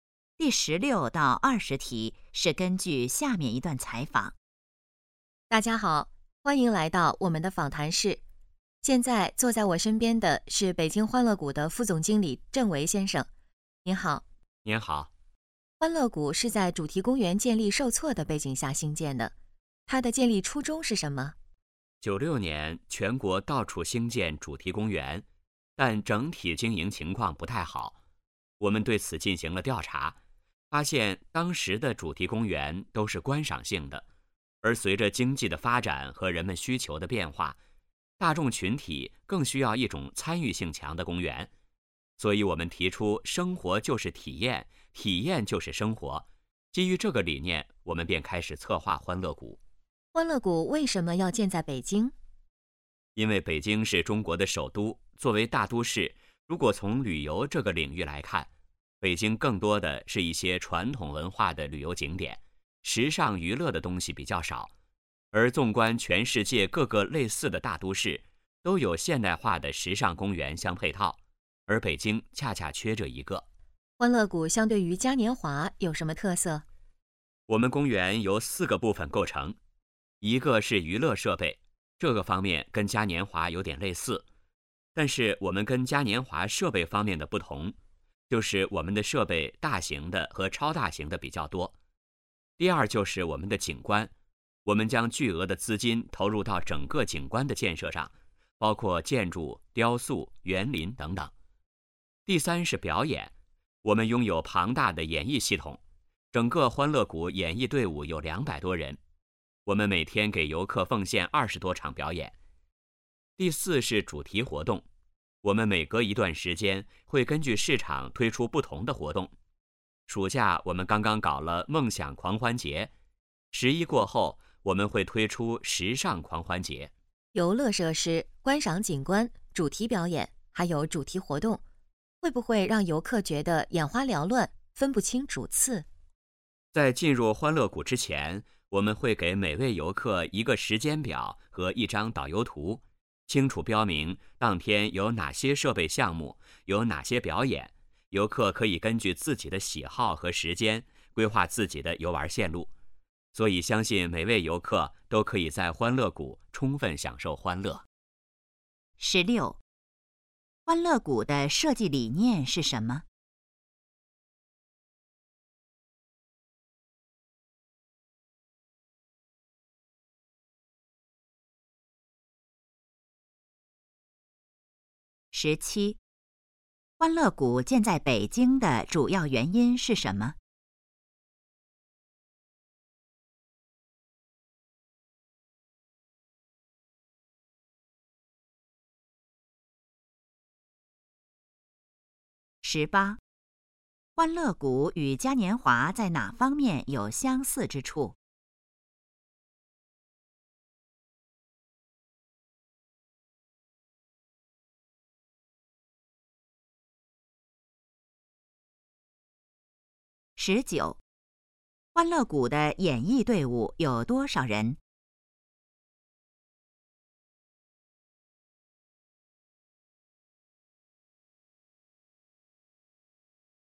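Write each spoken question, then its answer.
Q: 欢乐谷的设计理念是什么?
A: 生活就是体验,体验就是生活

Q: 欢乐谷建在北京的主要原因是什么?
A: 北京缺少现代化的时尚娱乐公园

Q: 欢乐谷与嘉年华在哪方面有相似之处?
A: 娱乐设备

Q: 欢乐谷的演艺队伍有多少人?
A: 200多人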